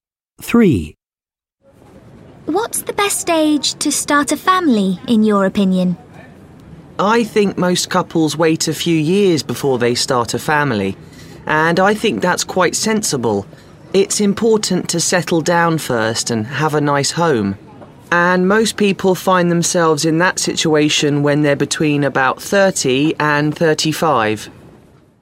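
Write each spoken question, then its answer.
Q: What's the best age to start a family, in your opinion?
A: Between about 30 and 35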